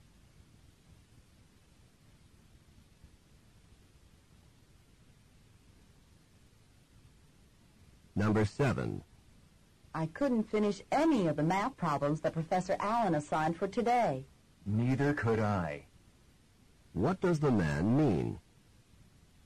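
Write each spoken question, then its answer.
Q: What does the man mean?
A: He could not finish the math problems either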